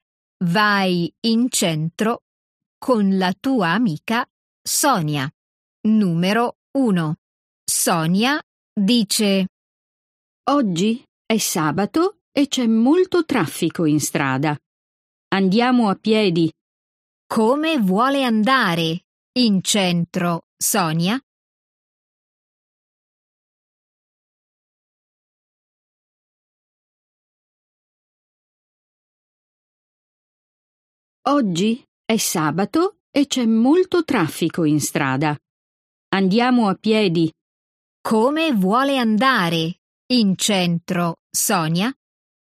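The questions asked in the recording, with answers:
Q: Come vuole andare in centro, Sonia?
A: a piedi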